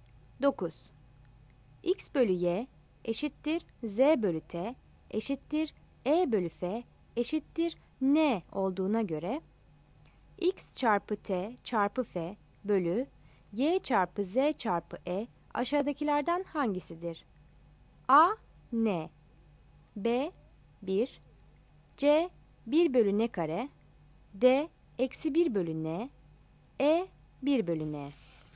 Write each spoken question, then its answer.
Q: X bölü Y eşittir Z bölü T eşittir E bölü F eşittir N olduğuna göre X çarpı T çarpı F bölü Y çarpı Z çarpı E aşağıdakilerden hangisidir?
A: Yanıt E'dir.